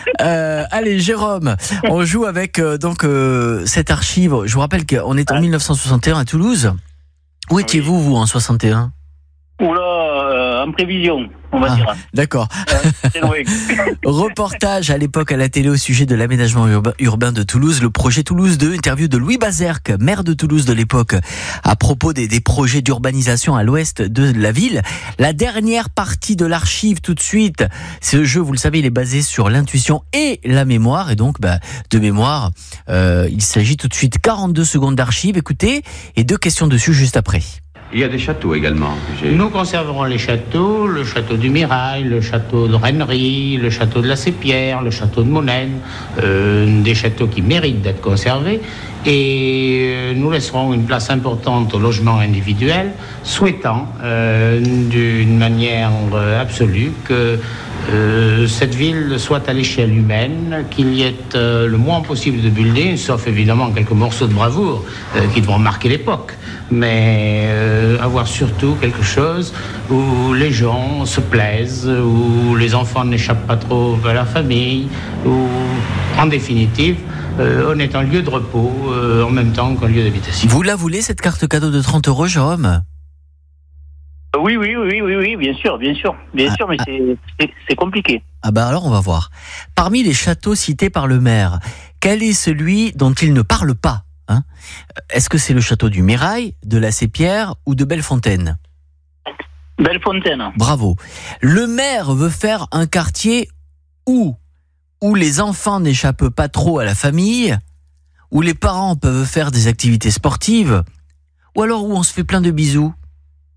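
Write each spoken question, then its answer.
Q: Parmi les châteaux cités par le maire, quel est celui dont il ne parle pas?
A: Le château de Bellefontaine

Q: Le maire veut faire un quartier où les enfants n'échappent pas trop à la famille, où les parents peuvent faire des activités sportives, ou alors où on se fait plein de bisous.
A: Où les enfants n'échappent pas trop à la famille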